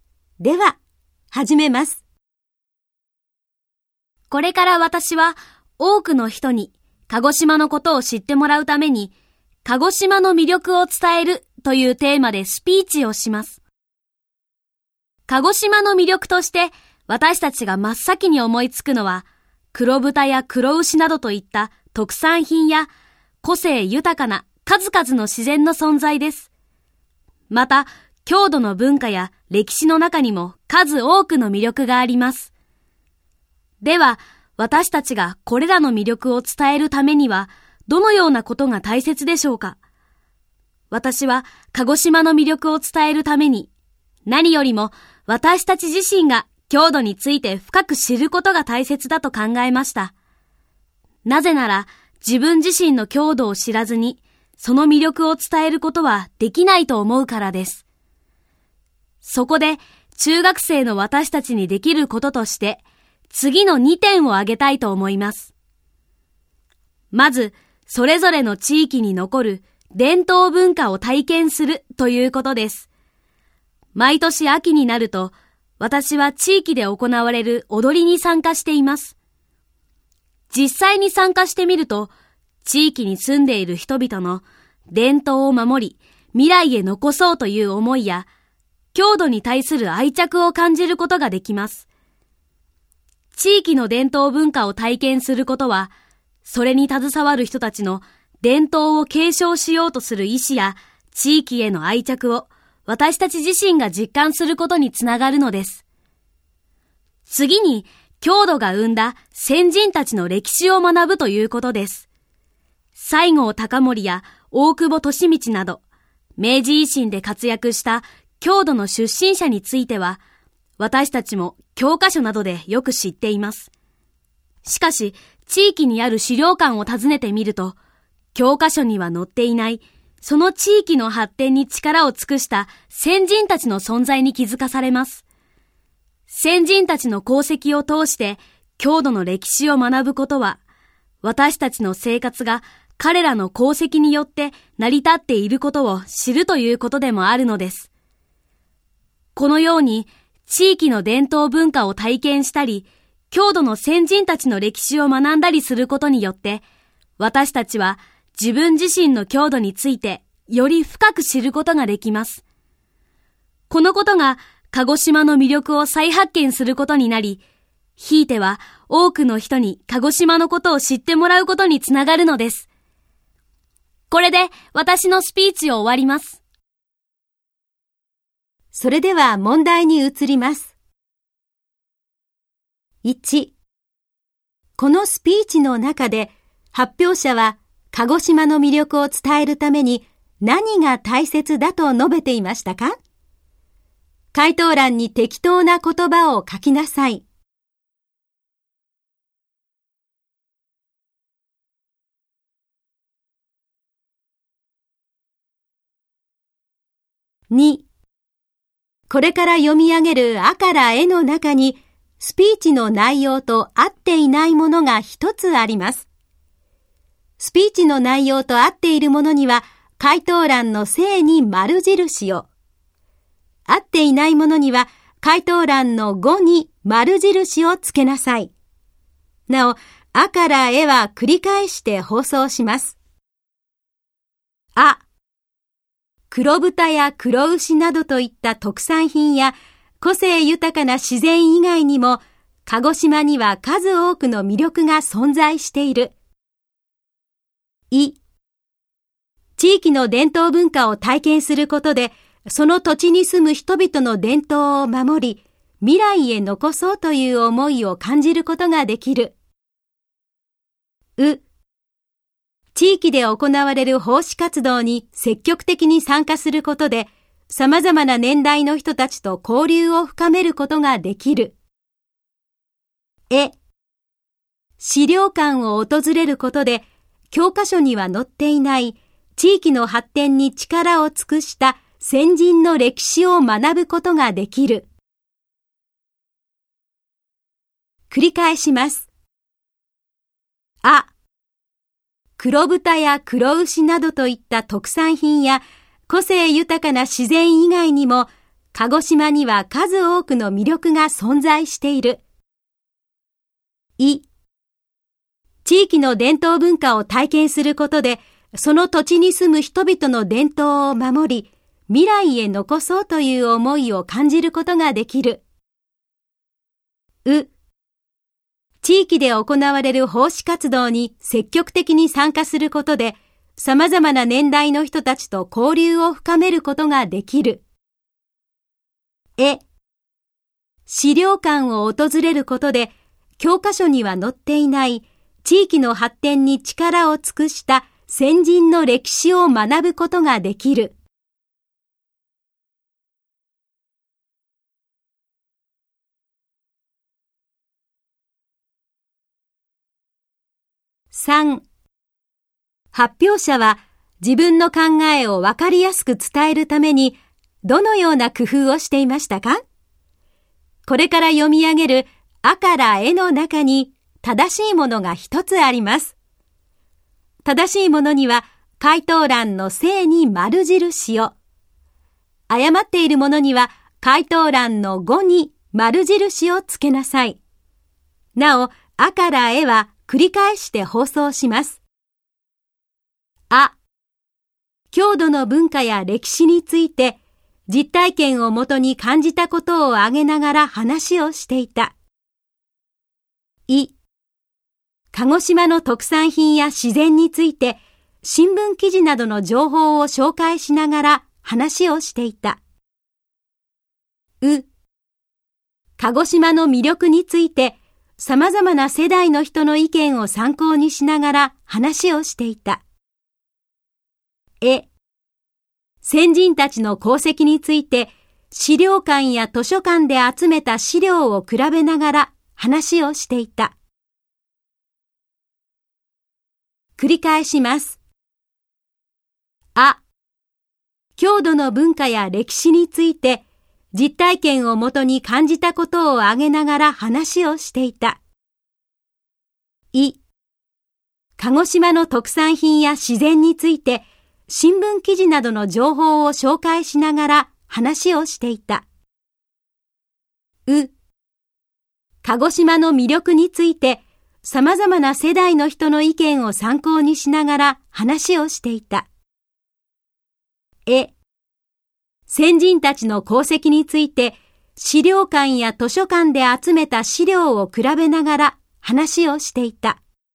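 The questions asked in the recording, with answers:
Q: このスピーチの中で発表者は鹿児島の魅力を伝えるために何が大切だと述べていましたか?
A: 私たち自身が郷土について深く知ること

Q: これから読み上げる A から E の中に、スピーチの内容と合っていないものが一つあります。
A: う: 地域で行われる奉仕活動に積極的に参加することで、様々な年代の人たちと交流を深めることができる。

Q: 発表者は自分の考えをわかりやすく伝えるためにどのような工夫をしていましたか?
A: あ: 郷土の文化や歴史について実体験をもとに感じたことを挙げながら話をしていた。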